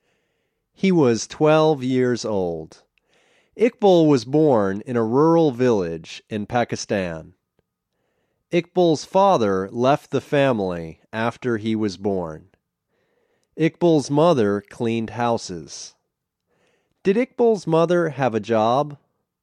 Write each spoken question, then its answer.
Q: Did Iqbal's mother have a job?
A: Yes, she cleaned houses.